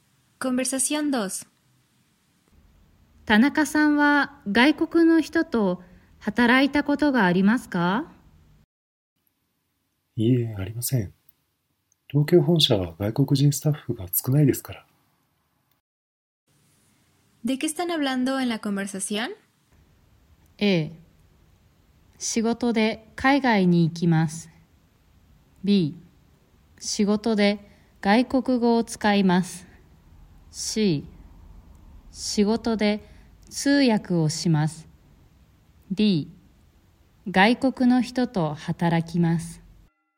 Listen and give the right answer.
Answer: La respuesta correcta es la D, porque estamos hablando sobre trabajar con una persona extranjera.